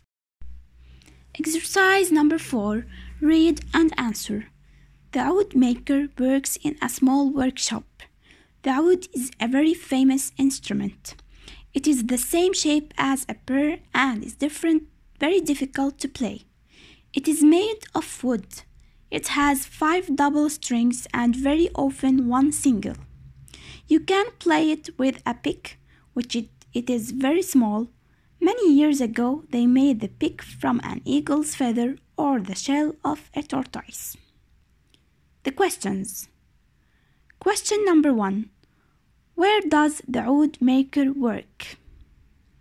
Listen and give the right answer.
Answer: he works in a small workshop.